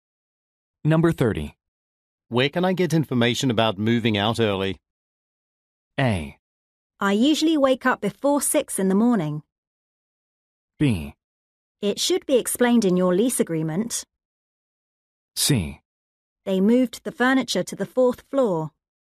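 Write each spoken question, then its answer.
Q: Where can I get information about moving out early?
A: B: It should be explained in your lease agreement.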